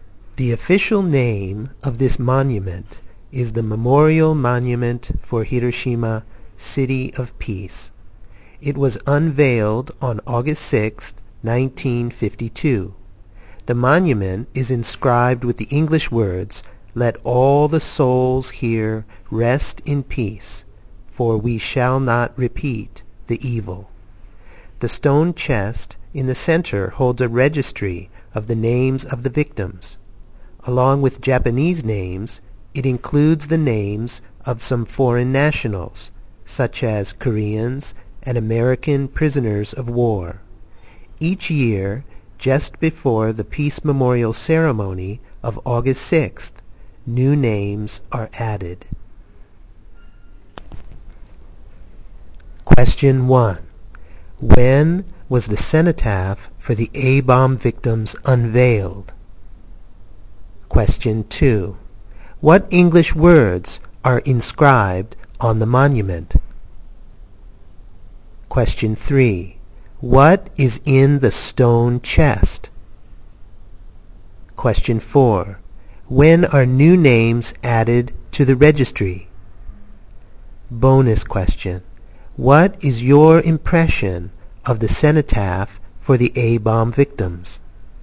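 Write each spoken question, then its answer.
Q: When was the cenotaph for the A-bomb victims unveiled?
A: August 6, 1952

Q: What English words are inscribed on the monument?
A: Let all the souls here rest in peace, for we shall not repeat the evil.

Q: What is in the stone chest?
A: A registry of the names of the victims

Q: When are new names added to the registry?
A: Each year, just before the Peace Memorial Ceremony of August 6th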